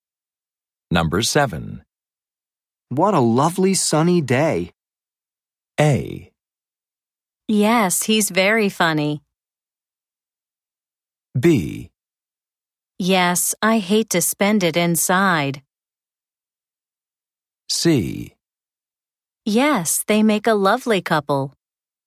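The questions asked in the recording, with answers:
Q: What a lovely sunny day.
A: B: Yes, I hate to spend it inside.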